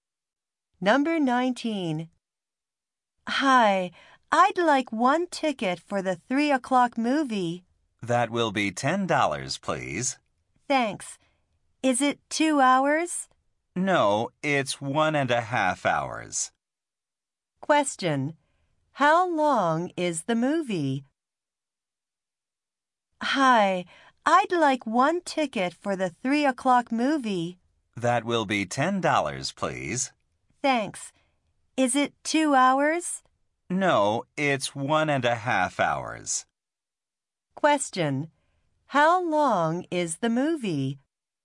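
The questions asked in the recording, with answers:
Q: How long is the movie?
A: 1.5 hours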